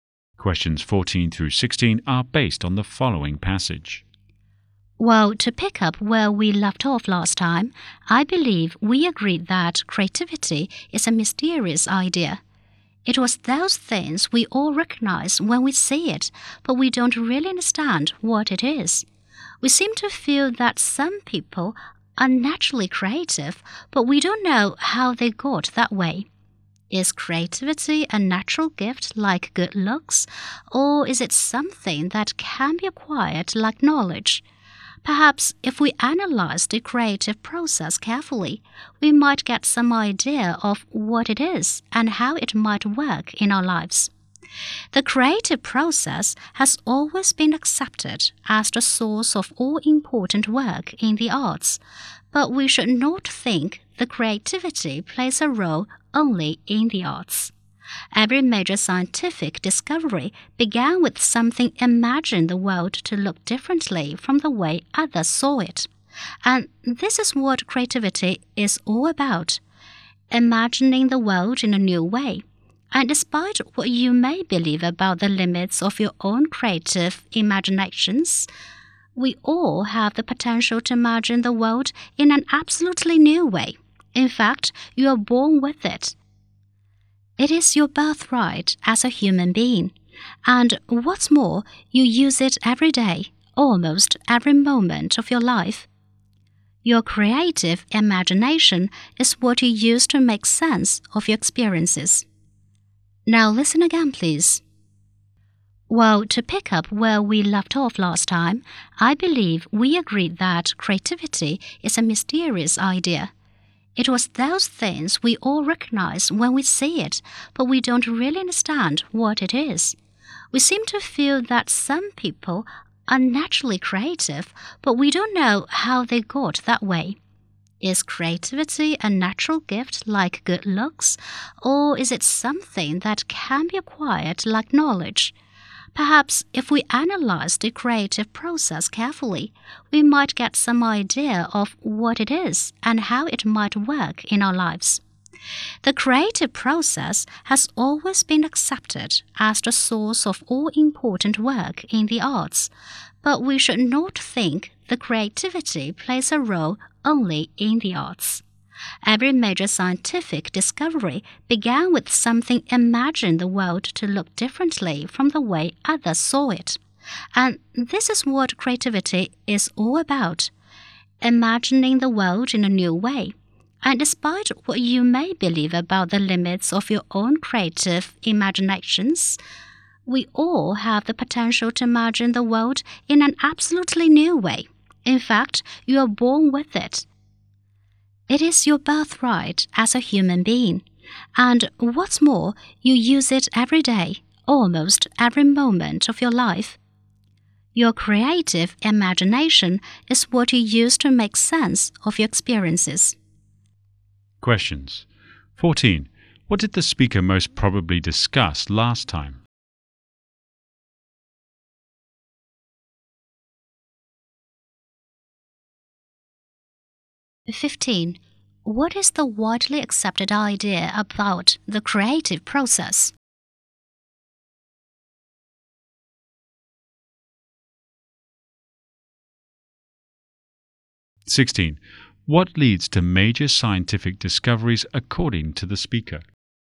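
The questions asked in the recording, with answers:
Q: What did the speaker most probably discuss last time?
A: That creativity is a mysterious idea

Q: What is the widely accepted idea about the creative process?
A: It is the source of all important work in the arts

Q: What leads to major scientific discoveries according to the speaker?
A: Imagining the world in a new way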